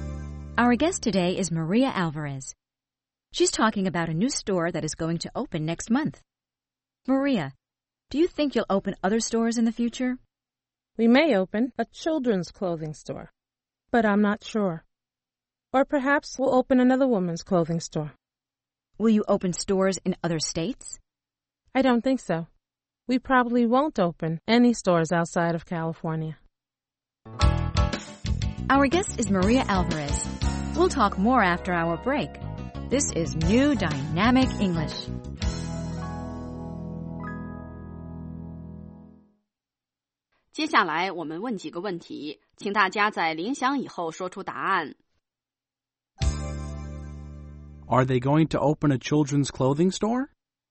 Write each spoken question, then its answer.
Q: Are they going to open a children's clothing store?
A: They may open a children's clothing store, but they're not sure.